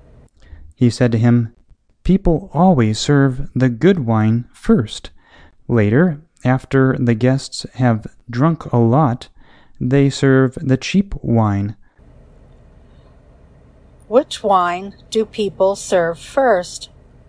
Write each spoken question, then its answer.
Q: Which wine do people serve first?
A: People serve the good wine first.